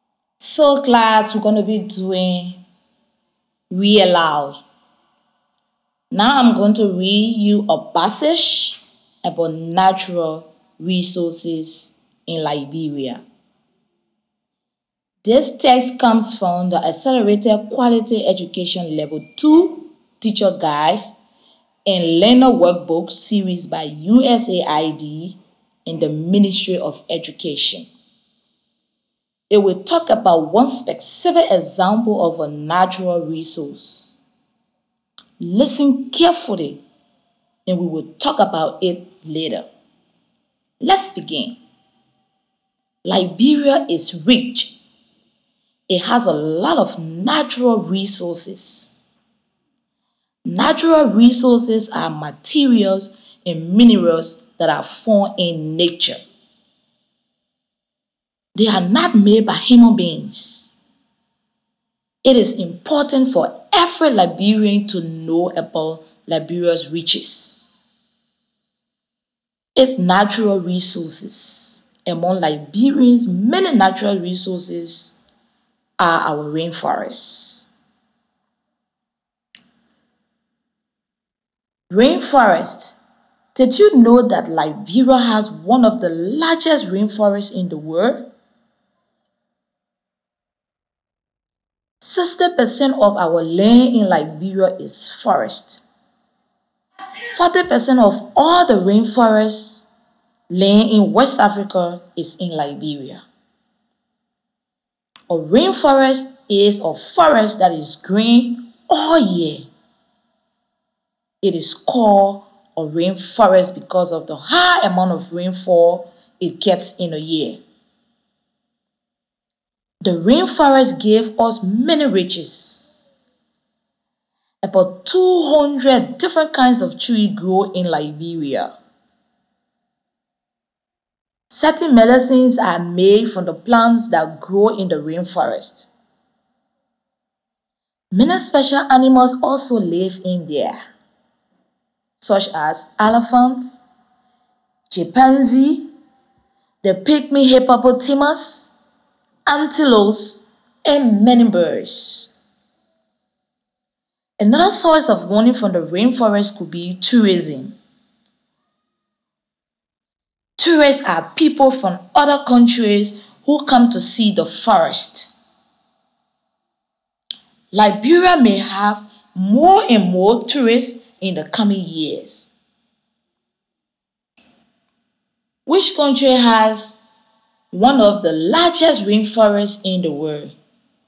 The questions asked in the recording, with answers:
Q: Which country has one of the largest rainforests in the world?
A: Liberia.